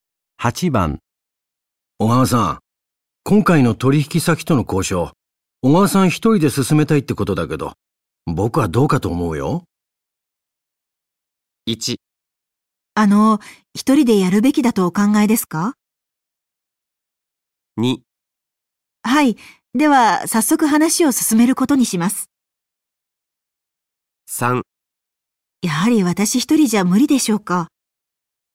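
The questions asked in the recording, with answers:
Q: 小川さん、今回の取引先との交渉、小川さん一人で進めたいってことだけど、僕はどうかと思うよ。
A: 3: やはり私一人じゃ無理でしょうか?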